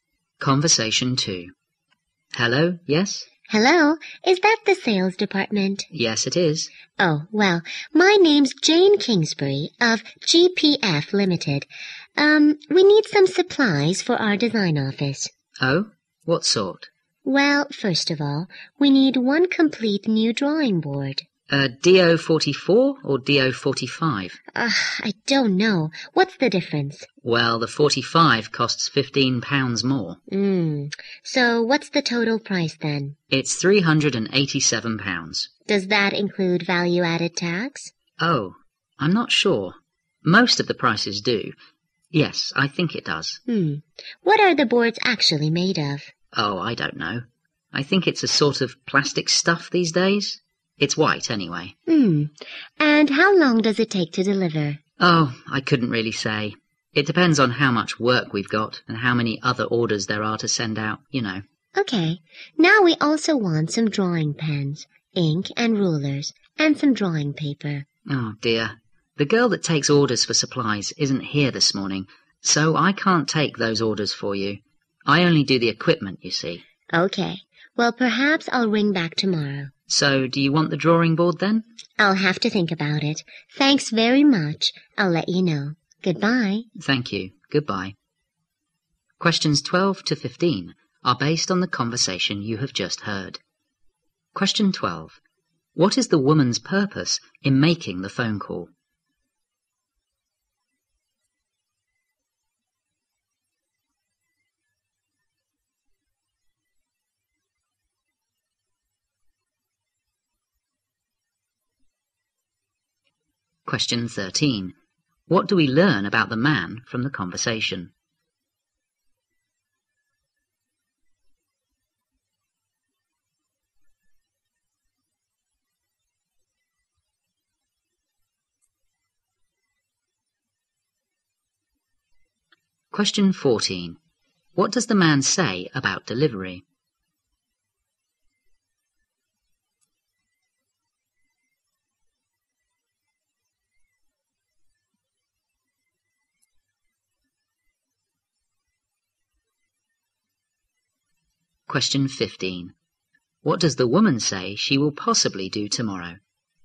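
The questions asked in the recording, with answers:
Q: What is the woman's purpose in making the phone call?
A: To order supplies for her design office.

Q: What do we learn about the man from the conversation?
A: He doesn't know much about the products; he only handles equipment.

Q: What does the man say about delivery?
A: He can't say how long it takes; it depends on workload and orders.

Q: What does the woman say she will possibly do tomorrow?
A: Ring back.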